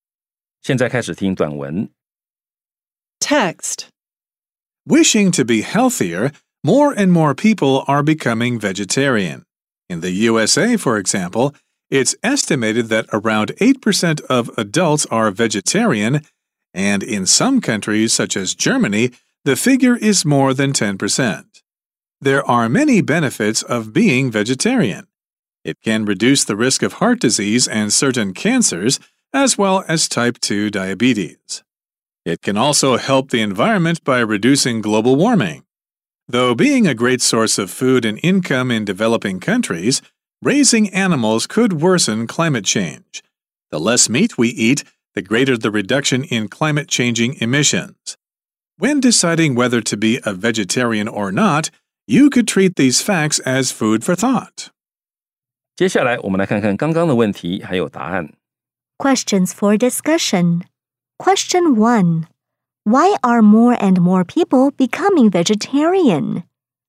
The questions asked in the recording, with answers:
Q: Why are more and more people becoming vegetarian?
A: Because they wish to be healthier.